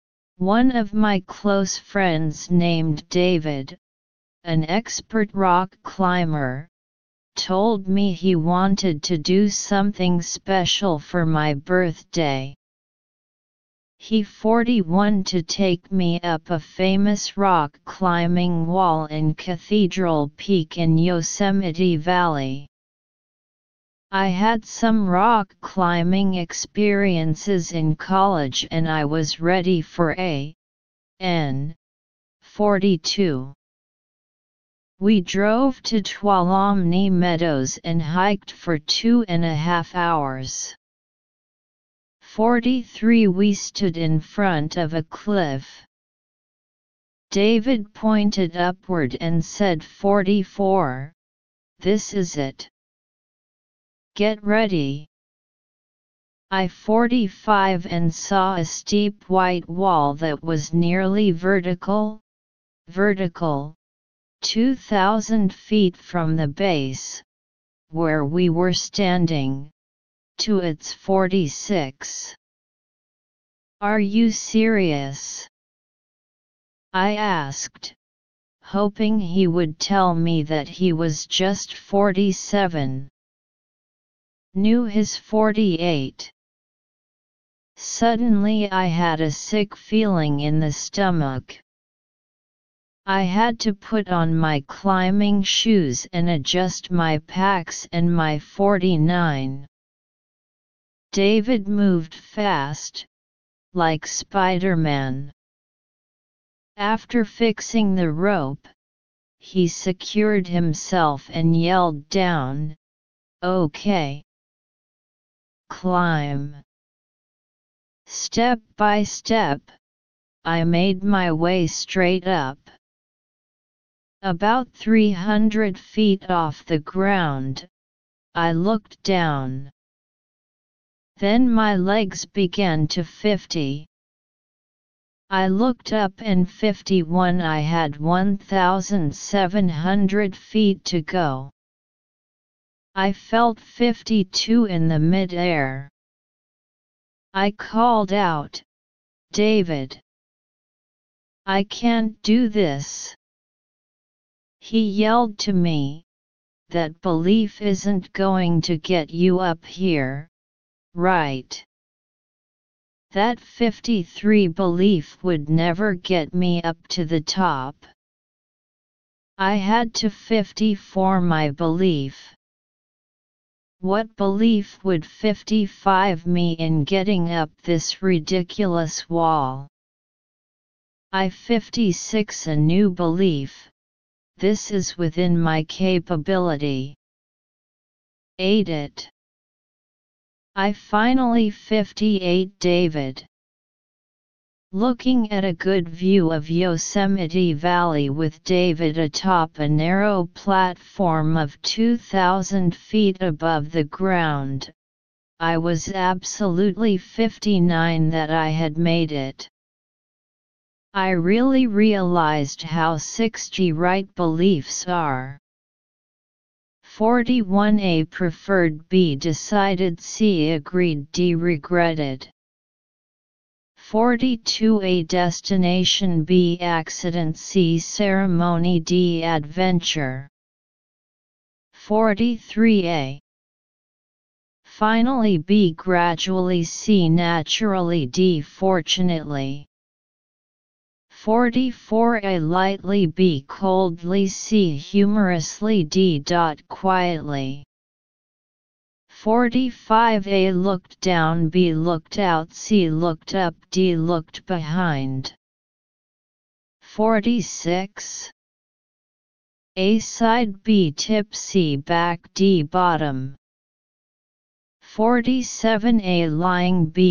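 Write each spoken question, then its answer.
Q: 41 A preferred, B decided, C agreed, D regretted.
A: B: decided

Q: 42 A destination, B accident, C ceremony, D adventure.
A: D: adventure

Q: 43 A finally, B gradually, C naturally, D fortunately.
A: A: finally

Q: 45 A looked down, B looked out, C looked up, D looked behind.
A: C: looked up

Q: 46 A side, B tip, C back, D bottom.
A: B: tip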